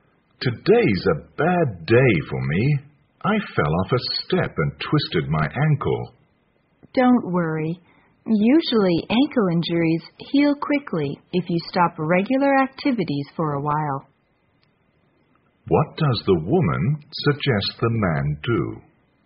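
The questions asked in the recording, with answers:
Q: What does the woman suggest the man do?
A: Rest and stop regular activities for a while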